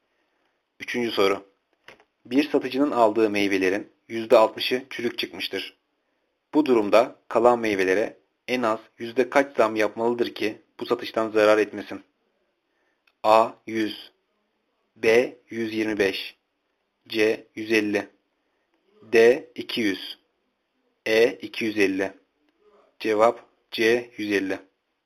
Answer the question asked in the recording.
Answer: Cevap C. 150.